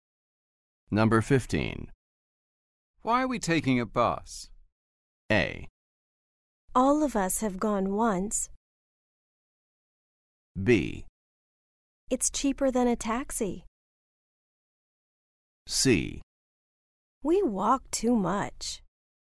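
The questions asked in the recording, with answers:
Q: Why are we taking a bus?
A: B: It's cheaper than a taxi.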